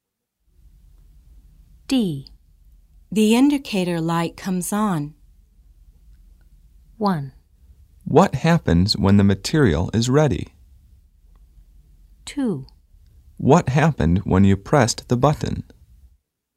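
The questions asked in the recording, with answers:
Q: The indicator light comes on.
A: 1: What happens when the material is ready?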